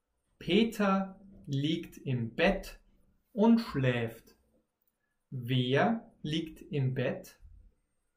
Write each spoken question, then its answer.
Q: Wer liegt im Bett?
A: Peter. Peter liegt im Bett.